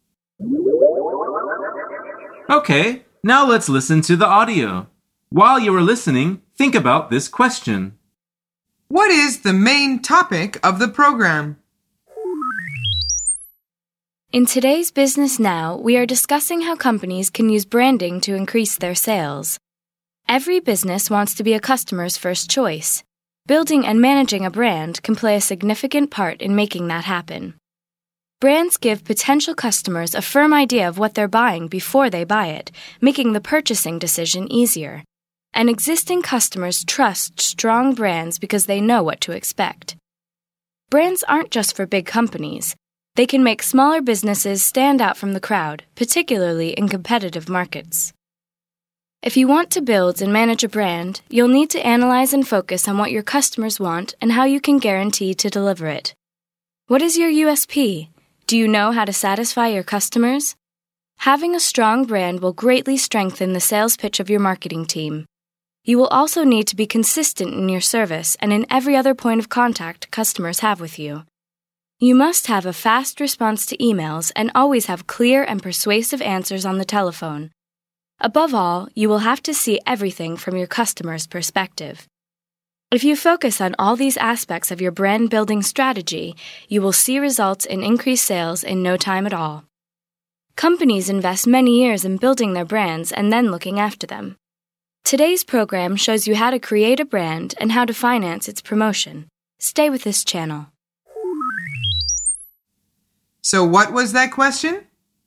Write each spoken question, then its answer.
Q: What is the main topic of the program?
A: The answer is branding, or building a brand.